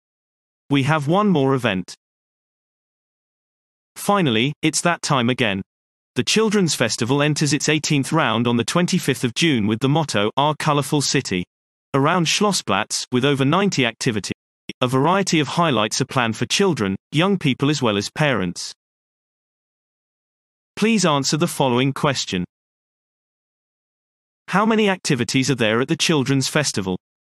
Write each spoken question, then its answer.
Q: How many activities are there at the Children's Festival?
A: There are over 90 activities at the Children's Festival.